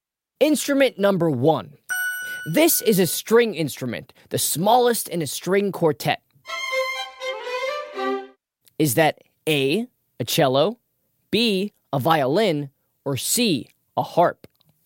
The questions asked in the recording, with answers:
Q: Is that A, a cello, B, a violin, or C, a harp?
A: It's a violin.